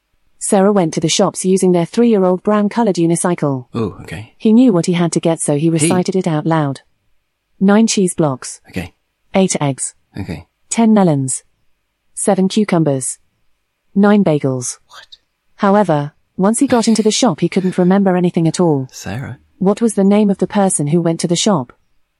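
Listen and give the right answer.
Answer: Sarah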